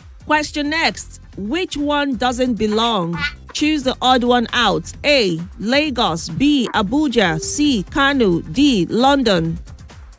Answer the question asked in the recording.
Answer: London is correct.